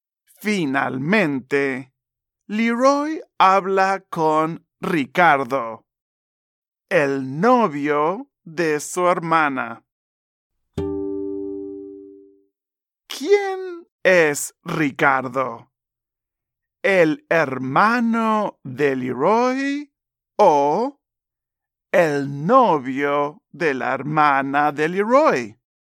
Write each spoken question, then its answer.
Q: ¿Quién es Ricardo?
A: Sí, es el novio de la hermana de Leroy.